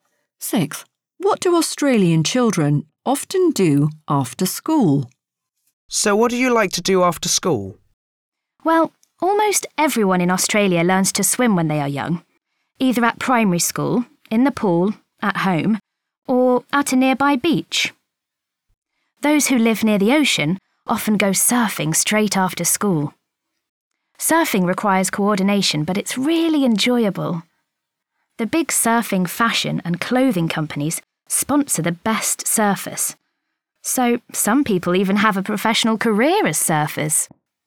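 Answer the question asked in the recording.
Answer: Go surfing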